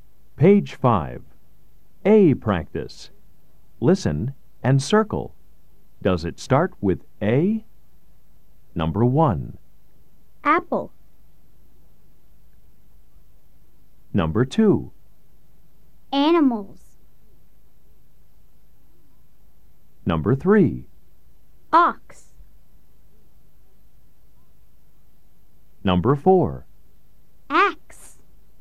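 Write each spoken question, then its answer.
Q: Does it start with A? Number 1.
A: Yes (apple)

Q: Number 2.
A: Yes (animals)

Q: Number 3.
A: No (ox)

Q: Number 4.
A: Yes (axe)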